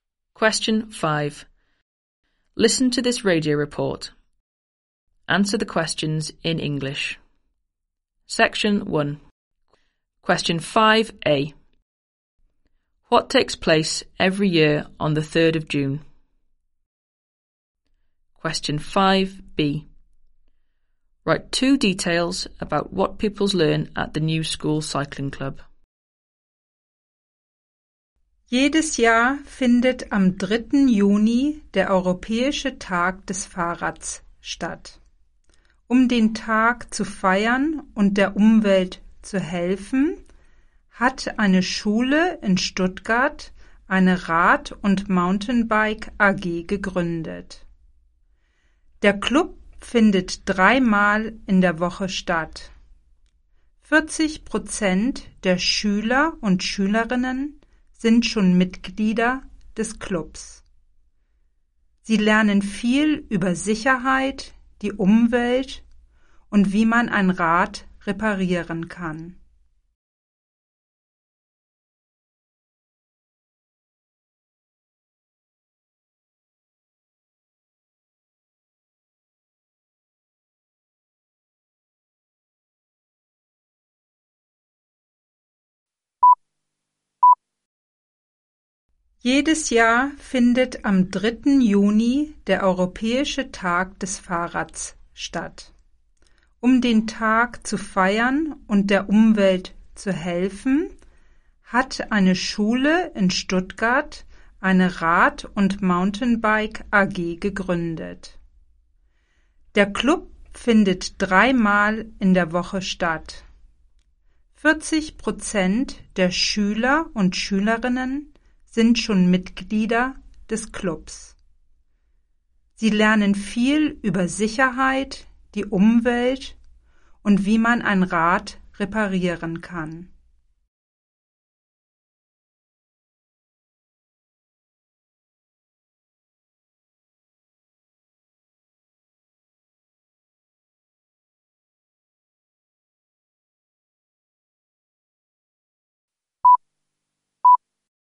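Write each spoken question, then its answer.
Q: What takes place every year on the 3rd of June?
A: European Bicycle Day

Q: Write two details about what pupils learn at the new school cycling club.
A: Safety, the environment, how to repair a bike (any two)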